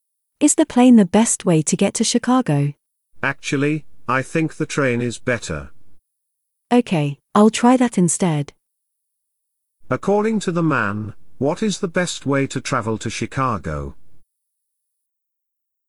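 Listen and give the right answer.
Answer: By train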